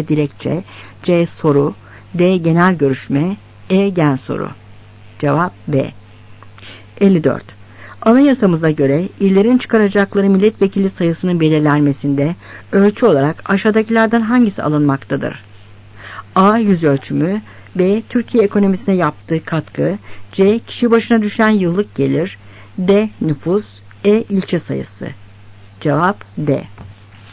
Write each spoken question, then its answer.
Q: Anayasamıza göre illerin çıkaracakları milletvekili sayısının belirlenmesinde ölçü olarak aşağıdakilerden hangisi alınmaktadır?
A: Cevap D.